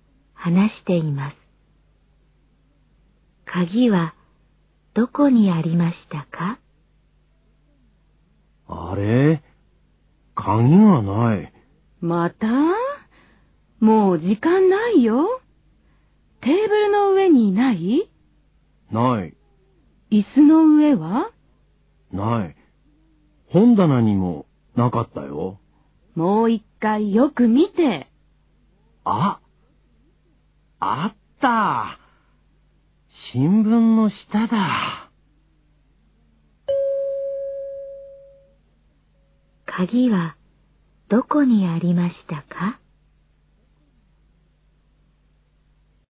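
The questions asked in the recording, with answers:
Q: 鍵はどこにありましたか?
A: 新聞の下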